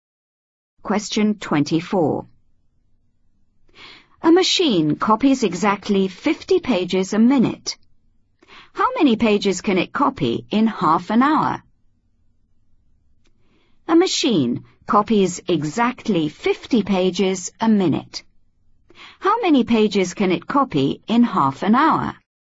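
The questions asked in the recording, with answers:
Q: How many pages can it copy in half an hour?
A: 1500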